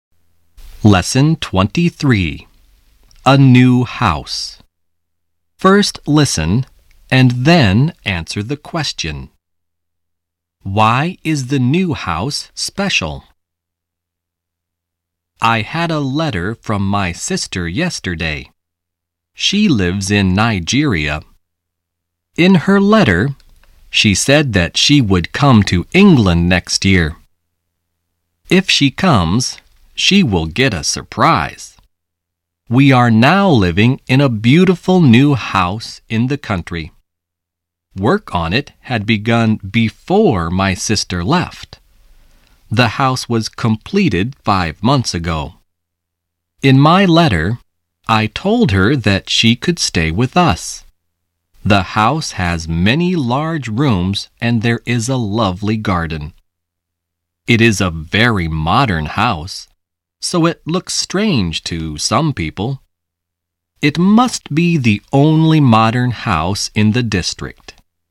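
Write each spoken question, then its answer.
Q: Why is the new house special?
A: It is very modern; it must be the only modern house in the district.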